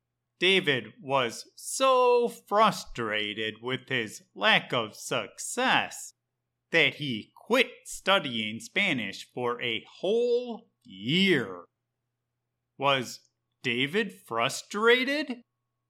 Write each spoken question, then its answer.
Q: Was David frustrated?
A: Yes. David was so frustrated that he quit studying Spanish for a whole year.